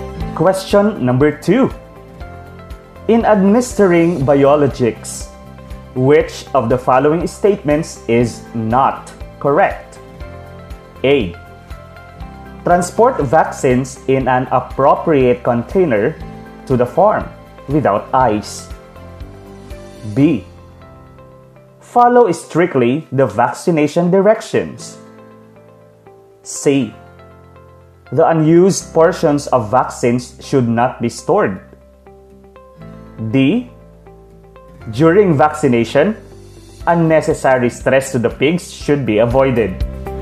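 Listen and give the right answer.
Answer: A: Transport vaccines in an appropriate container to the farm without ice.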